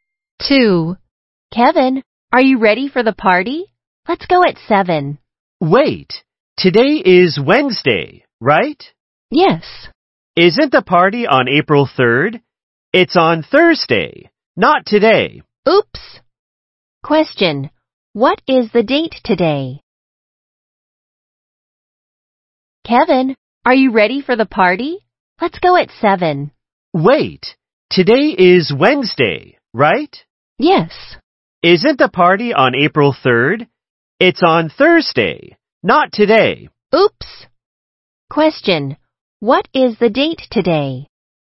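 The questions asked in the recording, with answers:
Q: what is the date today?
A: April 2nd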